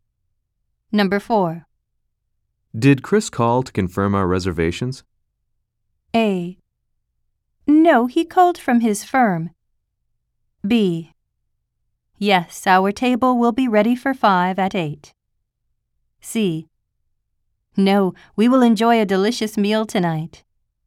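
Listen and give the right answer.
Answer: B: Yes, our table will be ready for 5 at 8.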